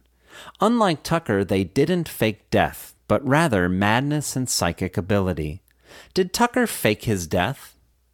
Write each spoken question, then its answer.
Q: Did Tucker fake his death?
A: Yes, Tucker faked his death.